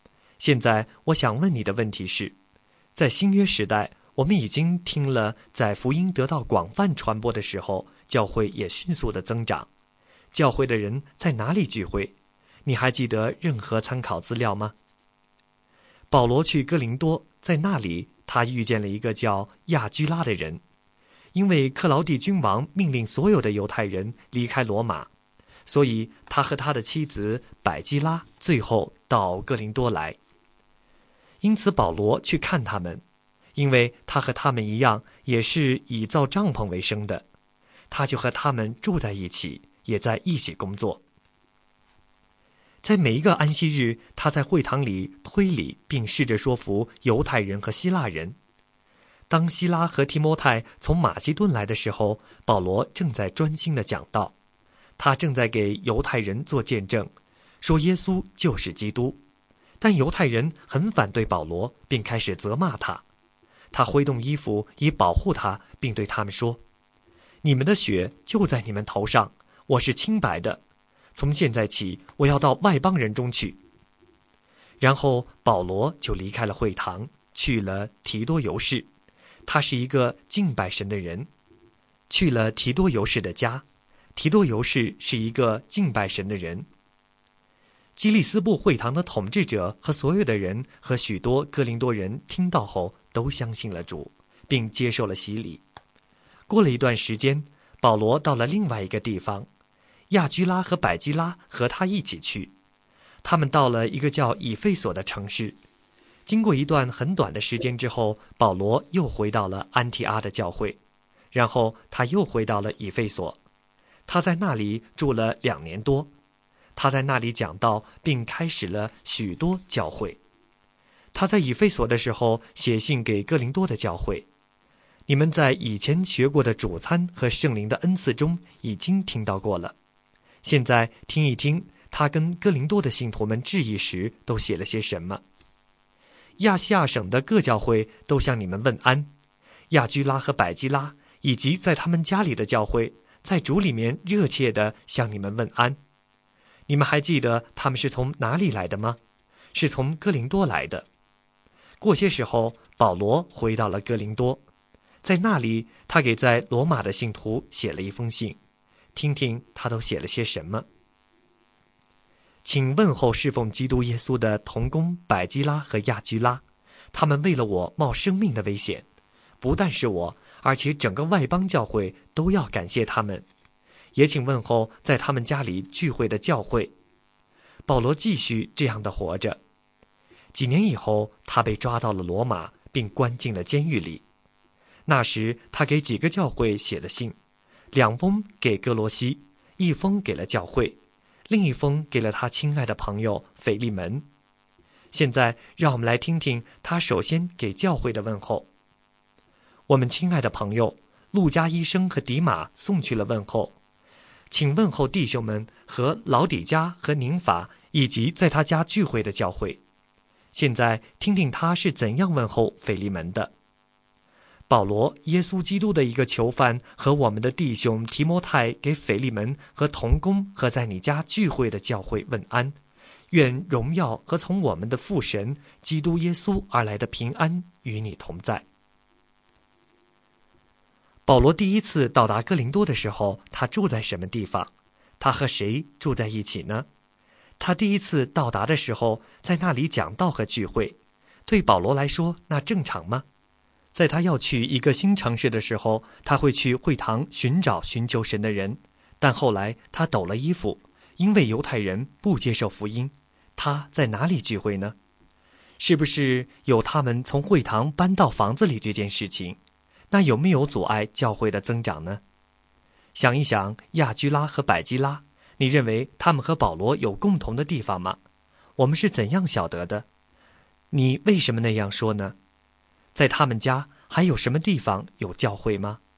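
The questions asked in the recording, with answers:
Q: 保罗第一次到达哥林多的时候,他住在什么地方?他和谁住在一起呢?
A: 住在亚居拉和百基拉家里,和他们住在一起

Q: 在他要去一个新城市的时候,他会去会堂寻找寻求神的人,但后来他抖了衣服,因为犹太人不接受福音,他在哪里聚会呢?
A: 在提多尤士的家里

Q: 想一想亚居拉和百基拉,你认为他们和保罗有共同的地方吗?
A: 有,他们和保罗一样以造帐篷为生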